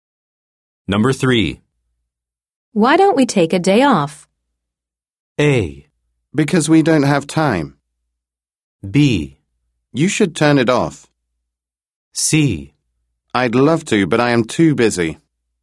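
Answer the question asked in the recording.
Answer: C: I'd love to, but I am too busy.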